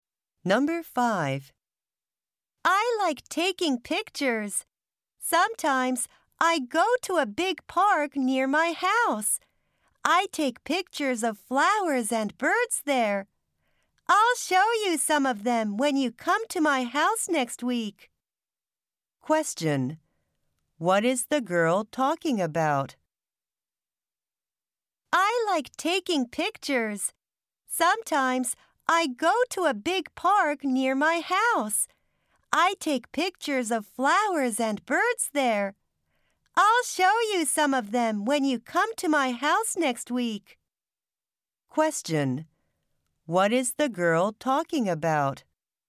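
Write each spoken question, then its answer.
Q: What is the girl talking about?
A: Taking pictures (her hobby of photographing flowers and birds in the park)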